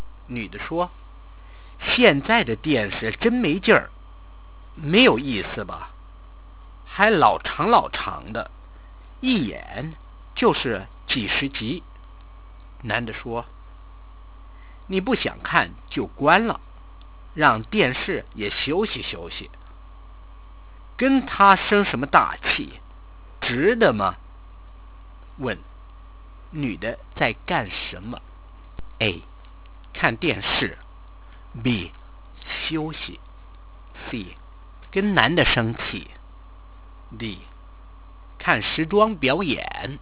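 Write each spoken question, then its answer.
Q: 问,女的在干什么?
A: A: 看电视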